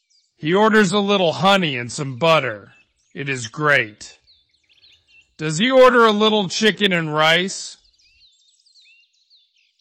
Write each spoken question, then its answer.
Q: Does he order a little chicken and rice?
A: No, he doesn't.